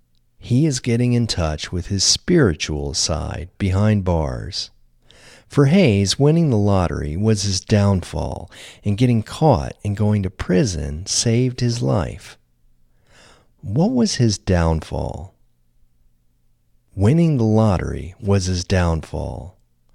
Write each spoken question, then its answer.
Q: What was his downfall?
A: Winning the lottery was his downfall.